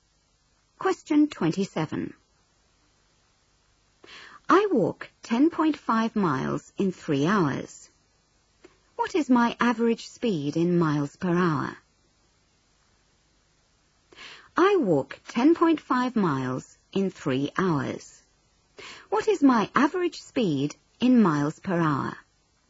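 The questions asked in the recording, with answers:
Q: What is my average speed in miles per hour?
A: 3.5 mph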